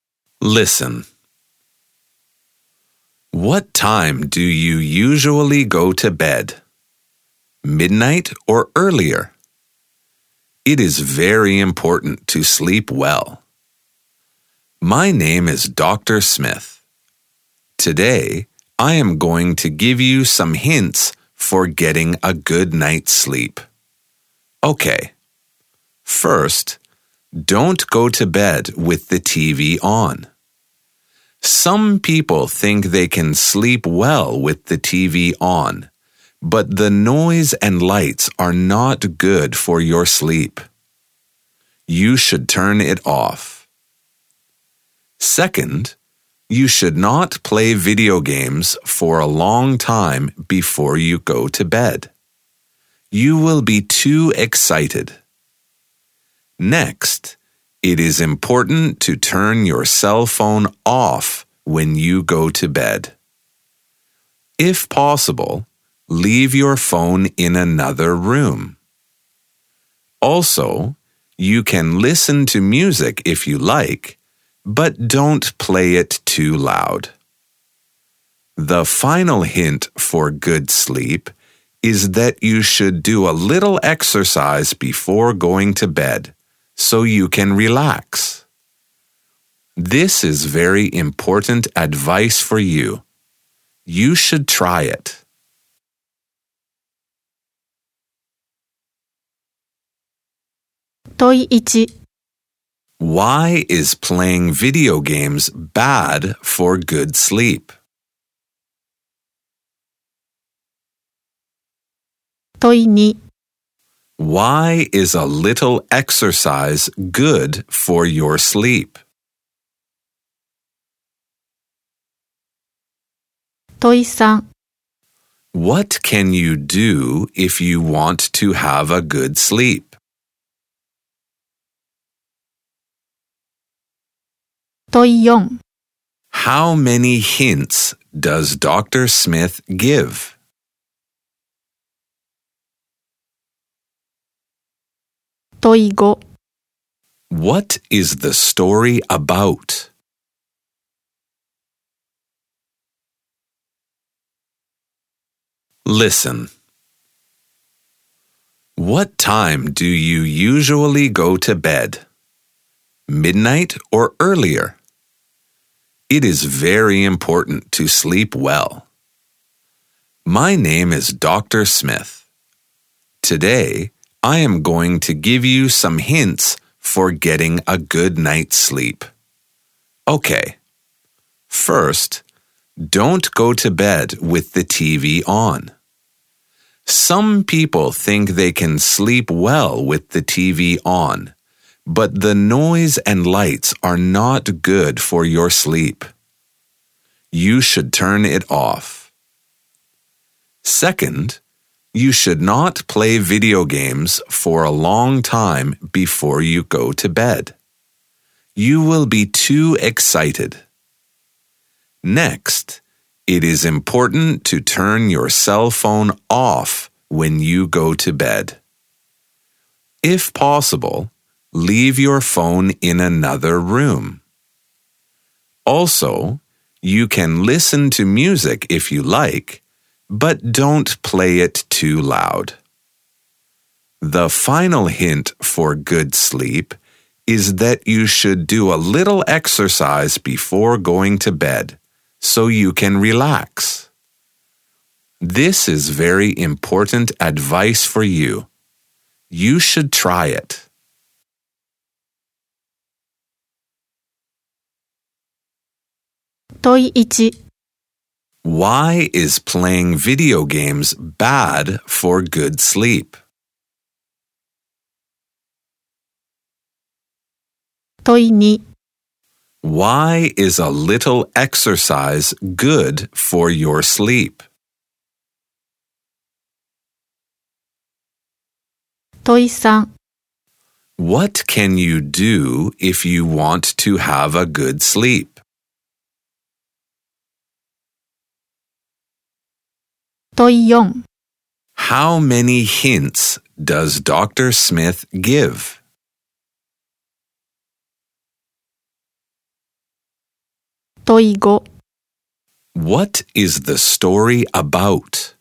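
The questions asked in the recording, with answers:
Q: Why is playing video games bad for good sleep?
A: You will be too excited

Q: Why is a little exercise good for your sleep?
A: It helps you relax

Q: What is the story about?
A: Hints for getting a good night's sleep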